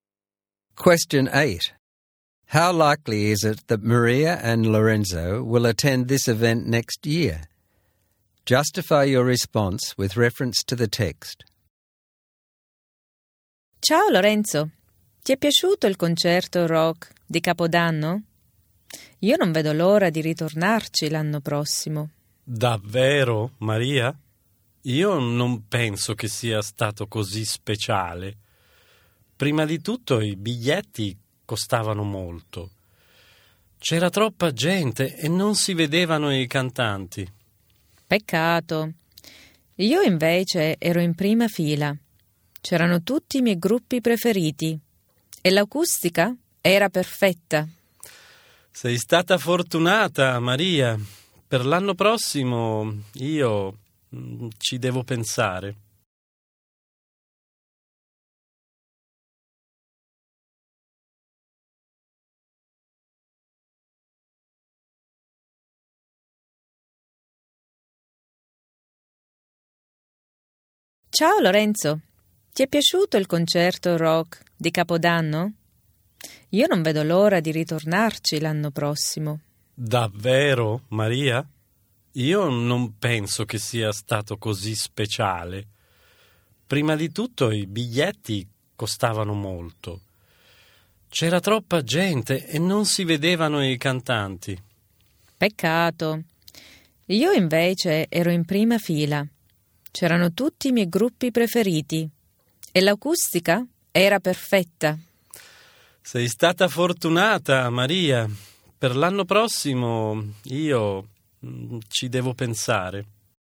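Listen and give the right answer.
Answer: Maria very likely: she can't wait to go back (front row, favourite bands, perfect acoustics). Lorenzo unlikely or unsure: the tickets were expensive, it was too crowded and he couldn't see the singers, so he has to think about it.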